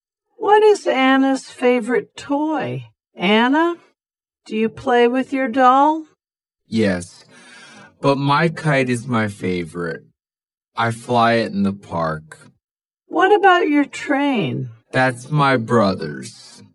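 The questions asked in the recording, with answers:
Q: What is Anna's favorite toy?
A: her kite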